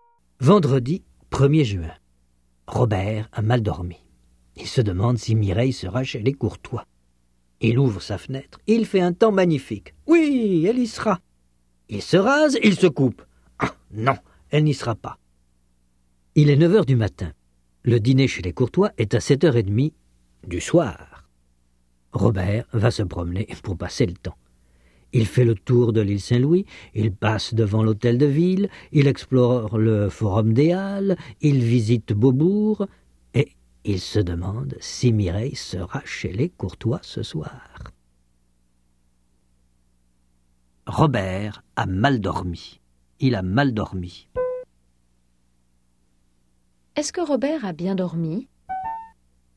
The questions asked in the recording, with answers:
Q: Est-ce que Robert a bien dormi?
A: Non, il a mal dormi.